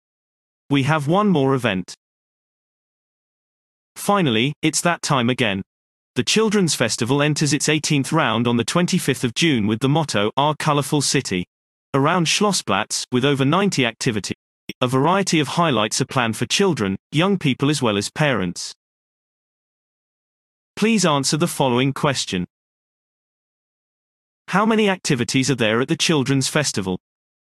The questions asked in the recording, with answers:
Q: How many activities are there at the Children's Festival?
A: There are over 90 activities at the Children's Festival.